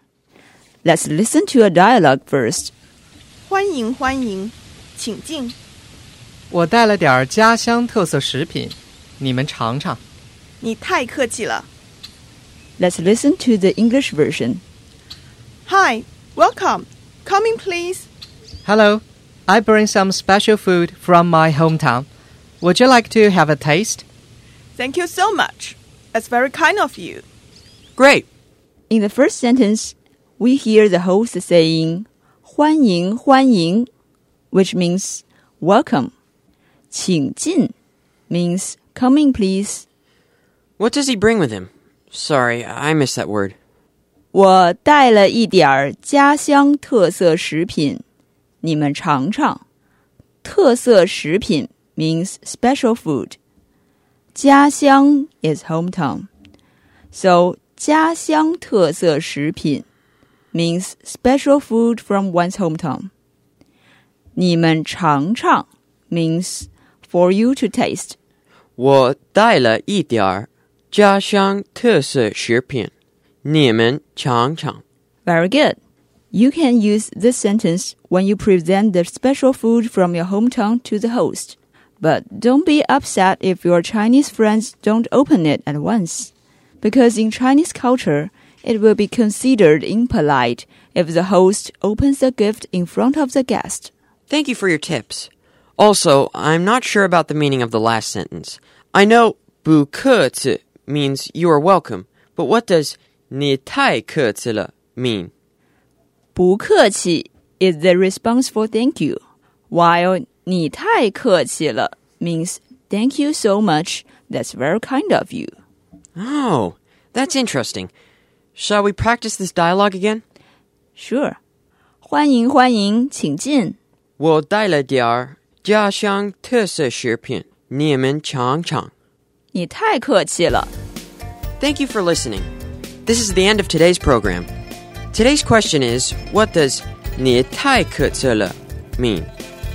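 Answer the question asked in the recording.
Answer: Thank you so much, that's very kind of you.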